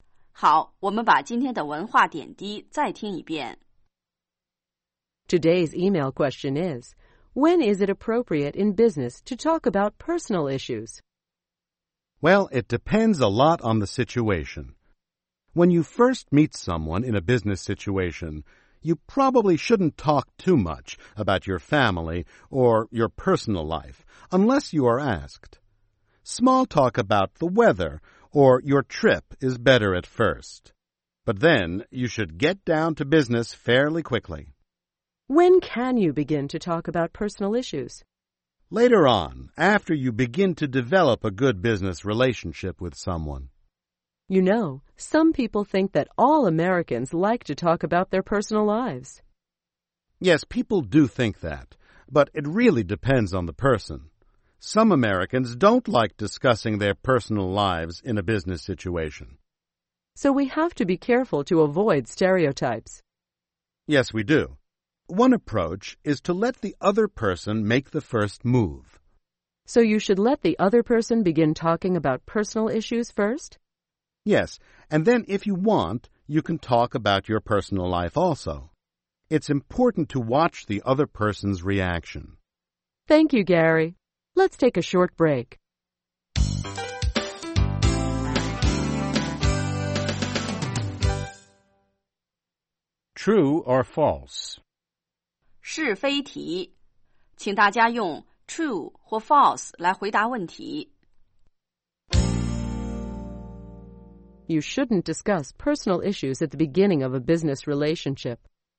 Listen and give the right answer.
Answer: True. Later on in the relationship, it may be okay.